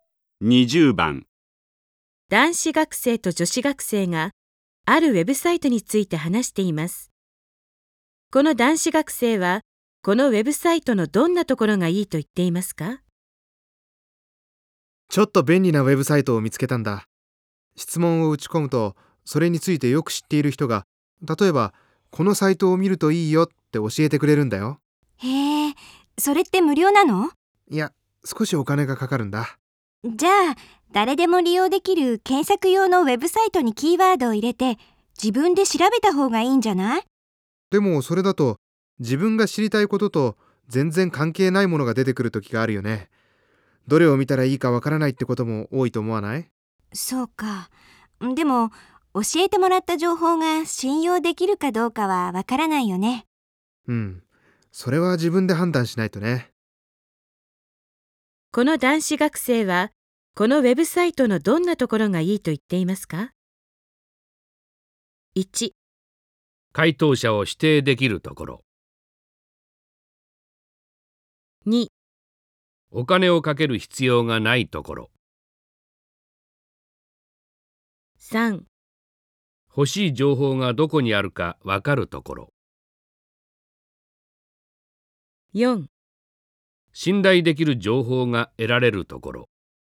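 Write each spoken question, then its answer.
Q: この男子学生はこのウェブサイトのどんなところがいいと言っていますか?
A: 3: 欲しい情報がどこにあるかわかるところ。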